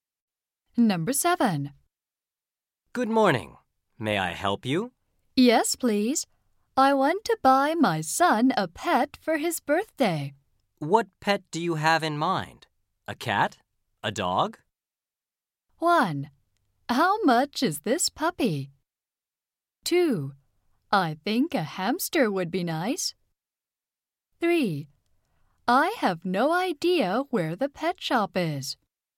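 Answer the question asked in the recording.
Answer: 2: I think a hamster would be nice.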